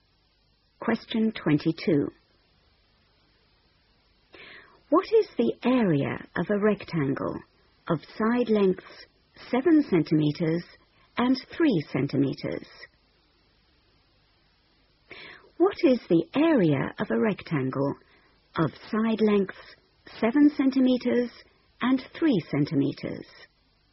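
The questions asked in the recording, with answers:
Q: What is the area of a rectangle of side lengths 7 centimeters and 3 centimeters?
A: 21 cm2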